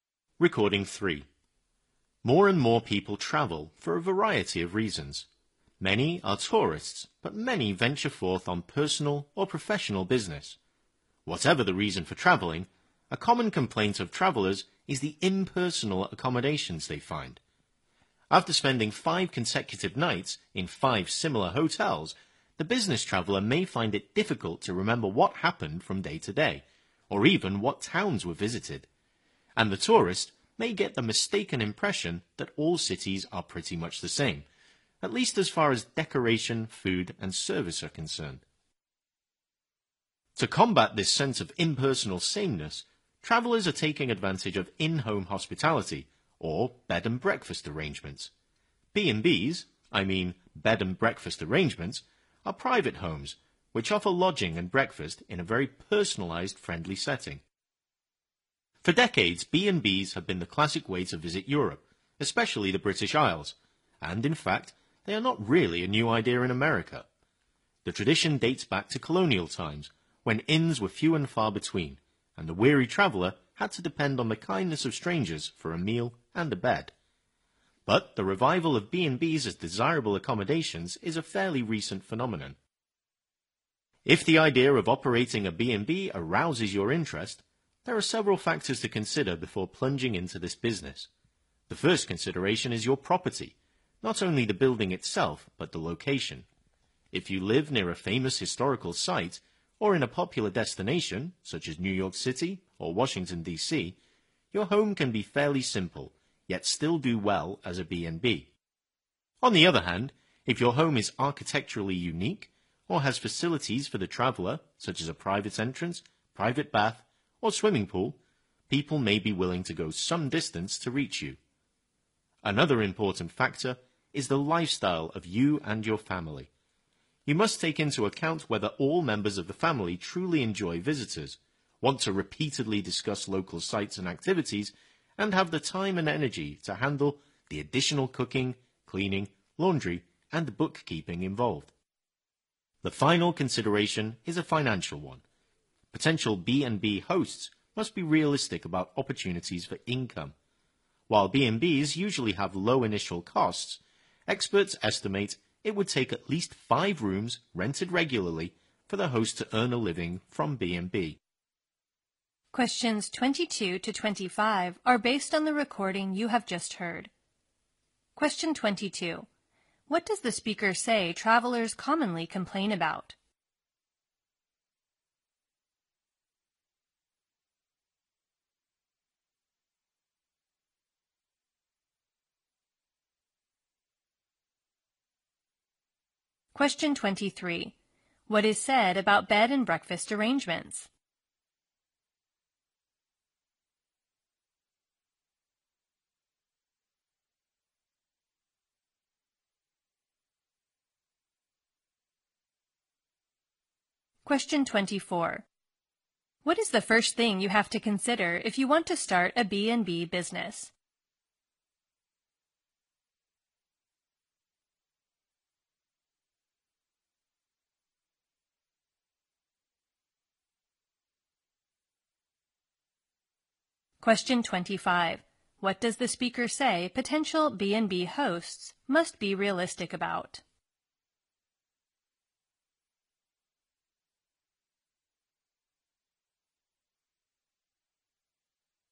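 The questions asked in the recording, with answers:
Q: What does the speaker say travelers commonly complain about?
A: Impersonal accommodations

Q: What is the first thing you have to consider if you want to start a B&B business?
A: Your property, including its location

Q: What does the speaker say potential B&B hosts must be realistic about?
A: Opportunities for income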